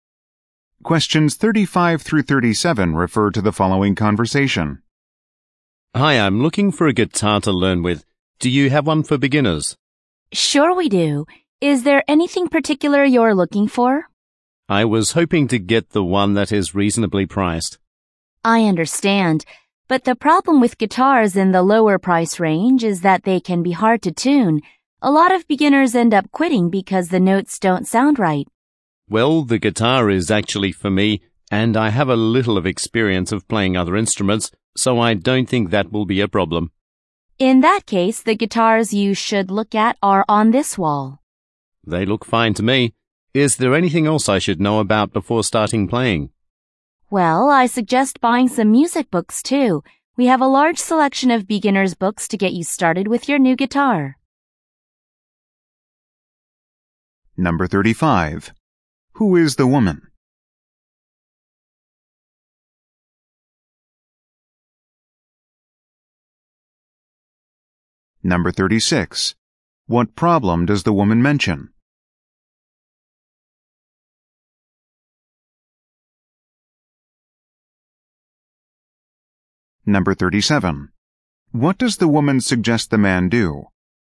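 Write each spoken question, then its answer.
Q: Who is the woman?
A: A salesperson at a music/guitar store

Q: What problem does the woman mention?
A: Cheap guitars can be hard to tune

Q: What does the woman suggest the man do?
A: Buy some music books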